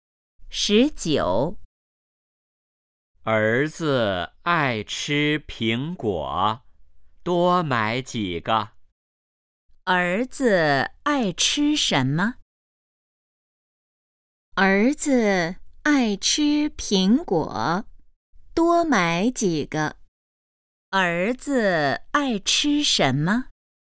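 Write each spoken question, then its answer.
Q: 儿子爱吃什么?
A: 苹果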